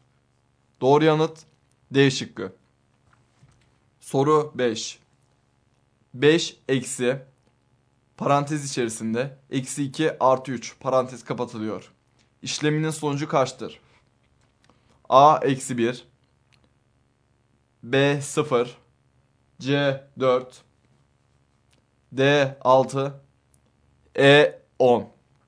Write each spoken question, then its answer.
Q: İşleminin sonucu kaçtır?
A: Doğru yanıt C şıkkı.